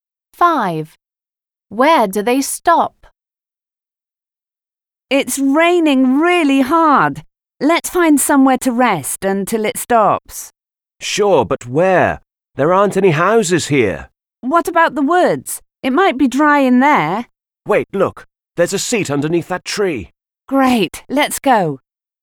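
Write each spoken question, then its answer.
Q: Where do they stop?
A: under a tree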